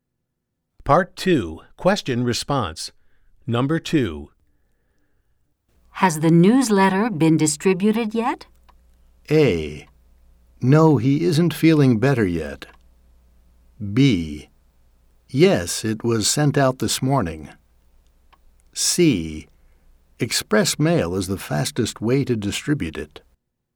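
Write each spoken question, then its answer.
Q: Has the newsletter been distributed yet?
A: B: Yes, it was sent out this morning.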